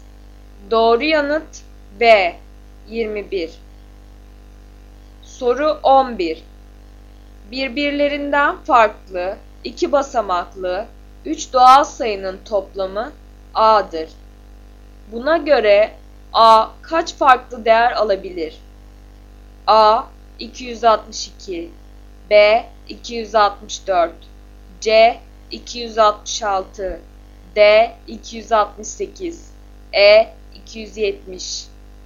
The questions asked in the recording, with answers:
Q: Buna göre A kaç farklı değer alabilir?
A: Doğru yanıt A 262.